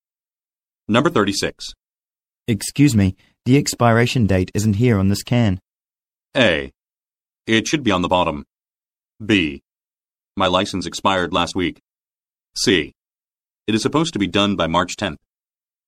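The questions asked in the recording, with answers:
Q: Excuse me, the expiration date isn't here on this can.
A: A: It should be on the bottom.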